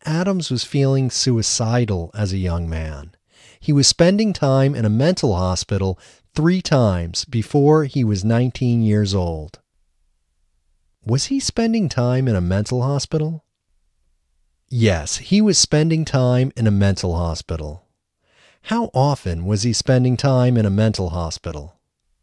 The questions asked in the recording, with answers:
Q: How often was he spending time in a mental hospital?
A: He was spending time in a mental hospital 3 times before he was 19 years old.